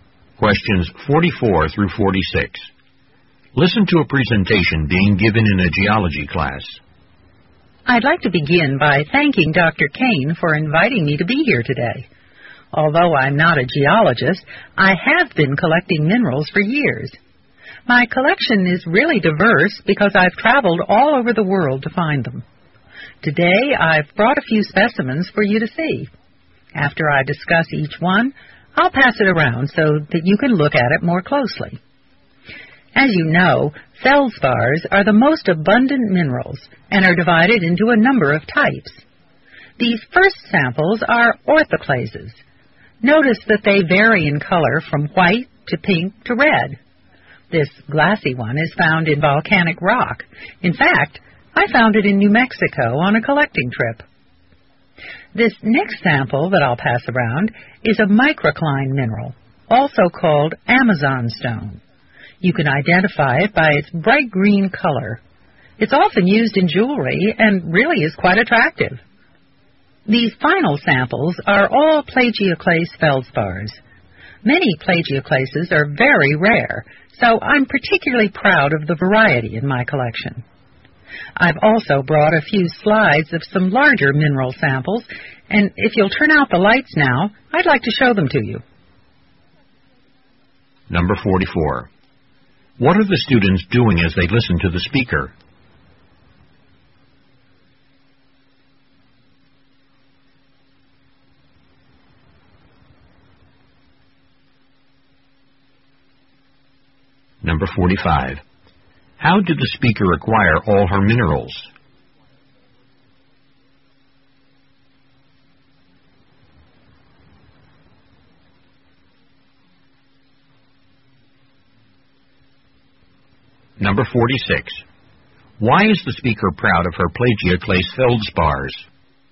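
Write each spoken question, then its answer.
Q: How did the speaker acquire all her minerals?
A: By traveling all over the world

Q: Why is the speaker proud of her plagioclase feldspars?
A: Many plagioclases are very rare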